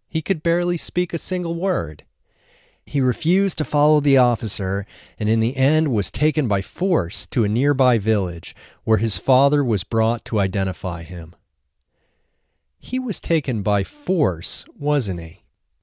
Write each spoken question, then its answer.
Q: He was taken by force, wasn't he?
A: Yes, he was taken by force.